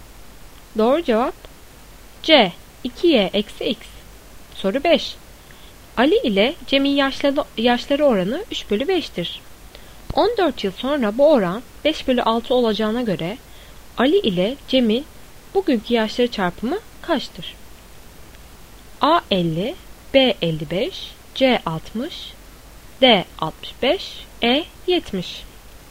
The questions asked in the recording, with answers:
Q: 14 yıl sonra bu oran 5/6 olacağına göre Ali ile Cem'in bugünkü yaşları çarpımı kaçtır?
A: Doğru cevap C 60.